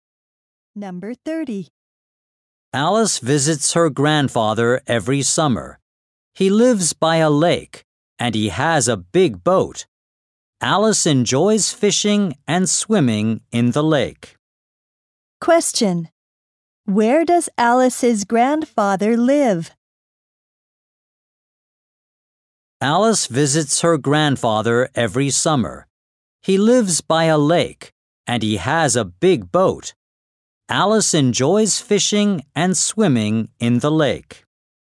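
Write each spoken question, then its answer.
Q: Question. Where does Alice's grandfather live?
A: By a lake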